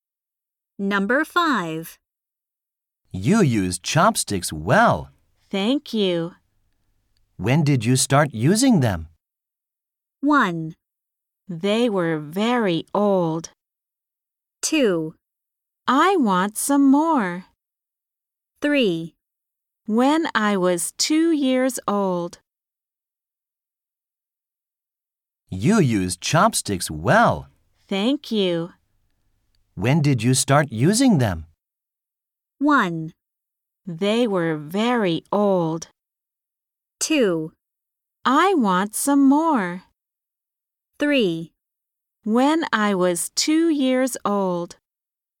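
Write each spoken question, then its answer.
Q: When did you start using them?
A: 3: When I was 2 years old.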